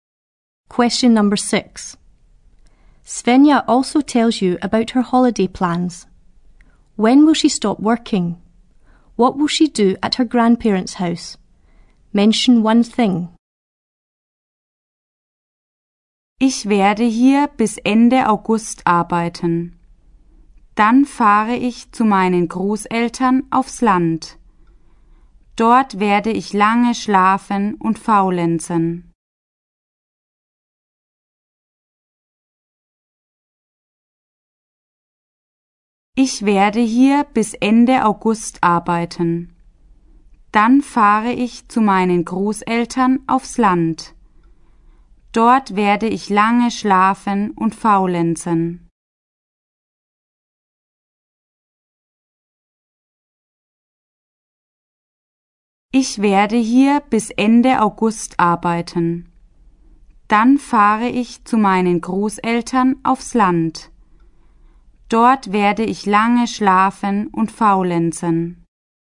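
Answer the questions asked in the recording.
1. At the end of August
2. Sleep in late and laze around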